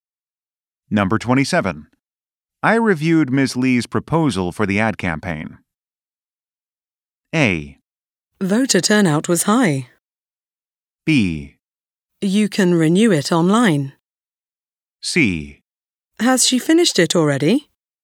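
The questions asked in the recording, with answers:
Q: I reviewed Ms. Lee's proposal for the ad campaign.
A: C: Has she finished it already?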